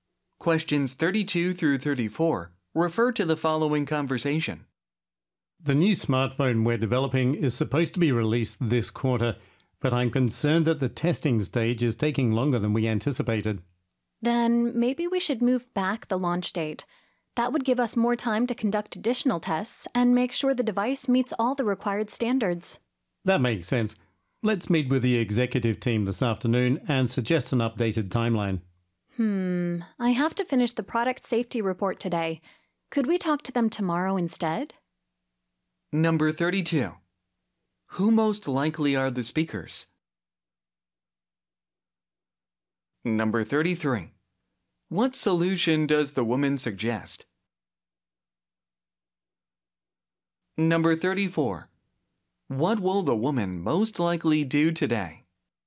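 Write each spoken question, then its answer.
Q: Who most likely are the speakers?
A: Smartphone developers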